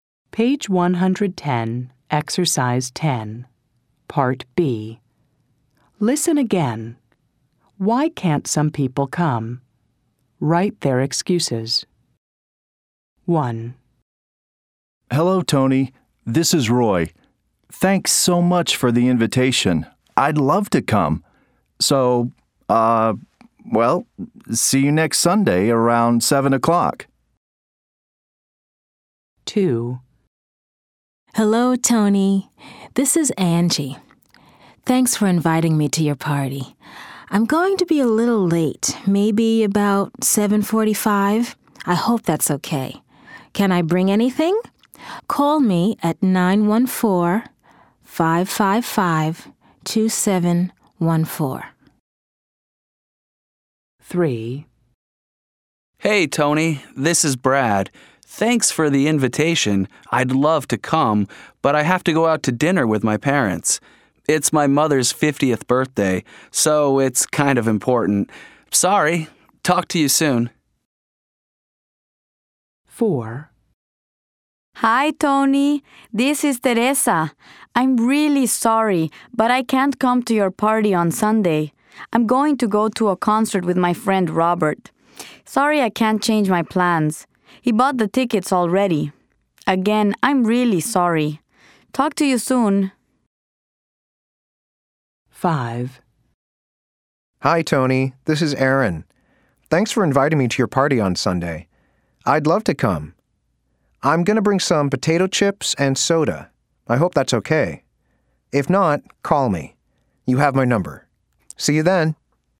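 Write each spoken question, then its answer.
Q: Why can't some people come?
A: Brad has to go out to dinner with his parents for his mother's 50th birthday.

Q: Why can't some people come?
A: Teresa is going to a concert with her friend Robert, who already bought the tickets.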